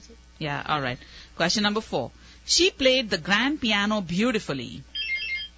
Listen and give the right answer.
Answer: The answer is grand.